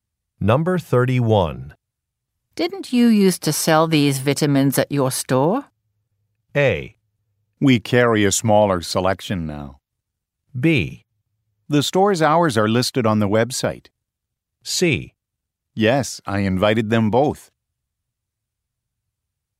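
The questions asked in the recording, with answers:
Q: Didn't you used to sell these vitamins at your store?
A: A: We carry a smaller selection now.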